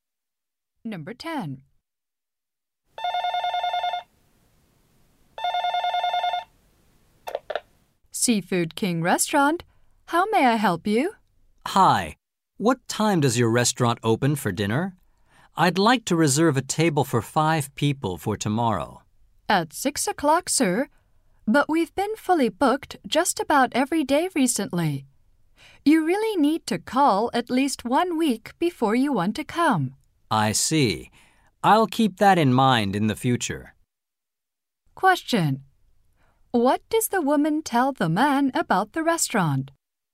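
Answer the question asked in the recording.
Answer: It is usually fully booked, so he should reserve at least a week ahead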